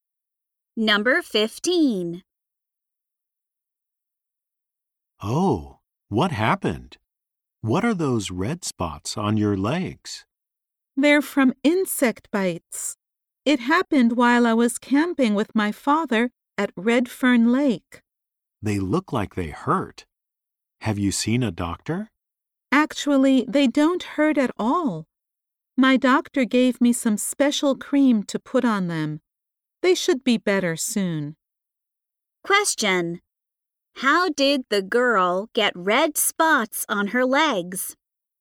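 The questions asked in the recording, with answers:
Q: How did the girl get red spots on her legs?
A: From insect bites while camping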